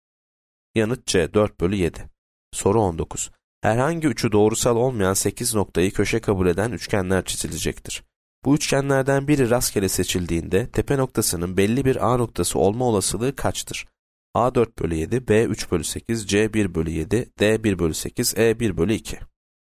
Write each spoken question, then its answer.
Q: Bu üçgenlerden biri rastgele seçildiğinde tepe noktasının belli bir A noktası olma olasılığı kaçtır?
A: Yanıt B 3 bölü 8.